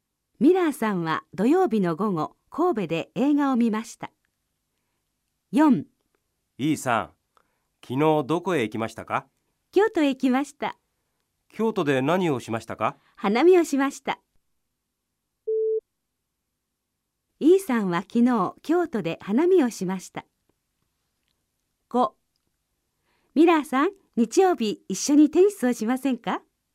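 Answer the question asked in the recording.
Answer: ○(正しい)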